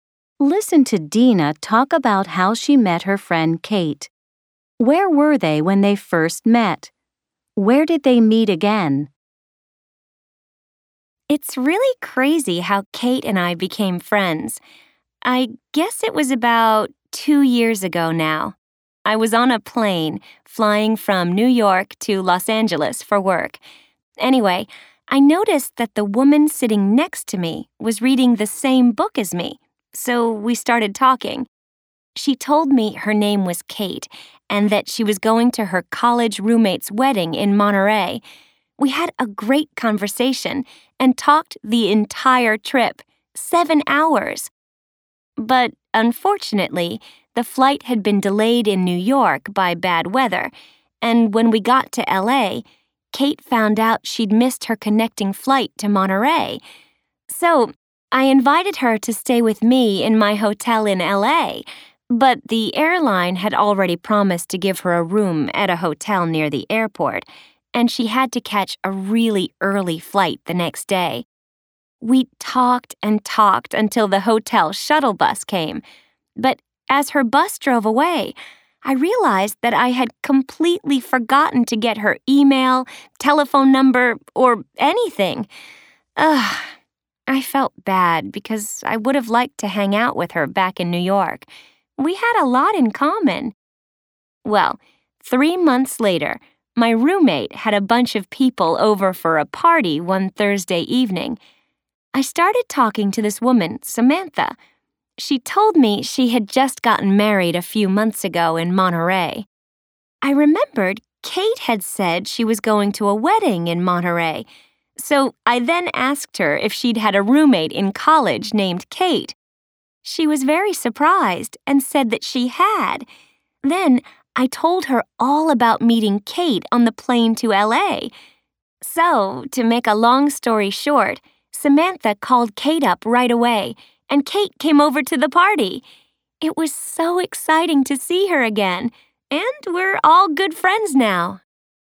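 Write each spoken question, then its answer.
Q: Where were they when they first met?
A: On a plane from New York to Los Angeles

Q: Where did they meet again?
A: At a party at Dina's place, thrown by her roommate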